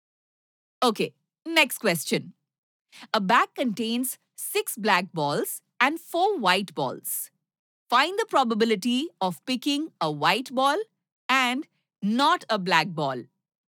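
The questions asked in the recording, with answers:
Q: Find the probability of picking a white ball and not a black ball.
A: 4/10 = 2/5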